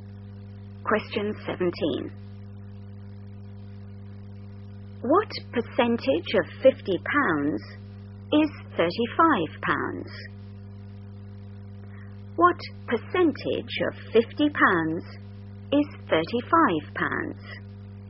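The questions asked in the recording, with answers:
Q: What percentage of £50 is £35?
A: 70%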